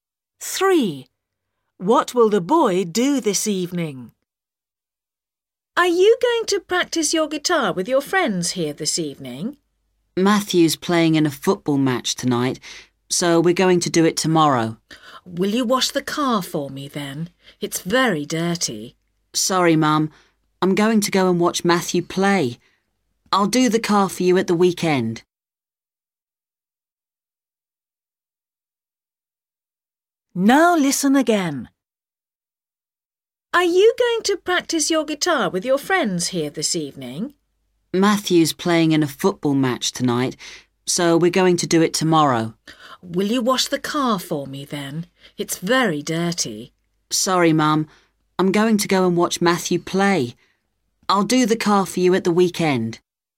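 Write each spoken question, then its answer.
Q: What will the boy do this evening?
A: watch Matthew play football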